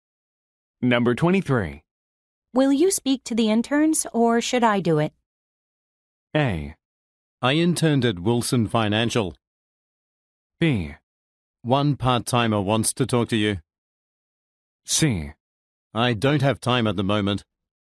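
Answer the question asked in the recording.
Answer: C: I don't have time at the moment.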